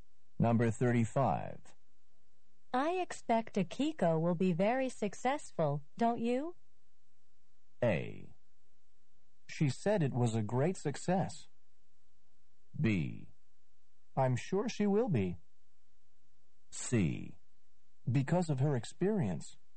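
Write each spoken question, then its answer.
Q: I expect Akiko will be very successful, don't you?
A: B: I'm sure she will be.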